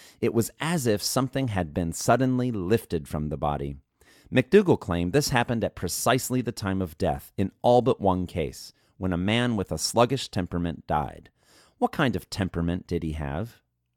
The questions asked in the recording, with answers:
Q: What kind of temperament did he have?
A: He had a sluggish temperament.